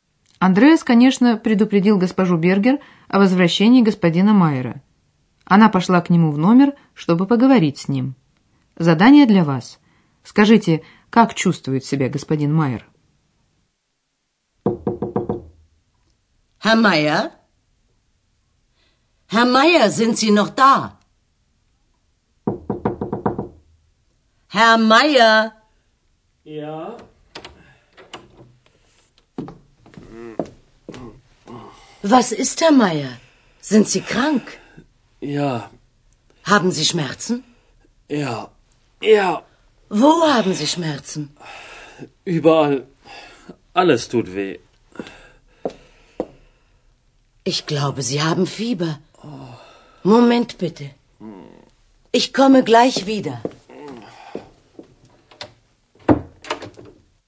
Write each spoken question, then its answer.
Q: Скажите, как чувствует себя господин Майер?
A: По стонам вы, конечно, догадались, что господину Майеру плохо, он болен.